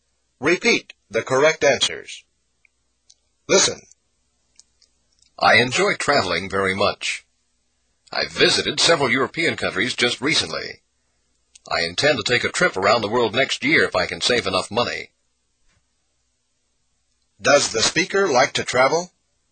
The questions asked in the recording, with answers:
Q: Does the speaker like to travel?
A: Yes, he does.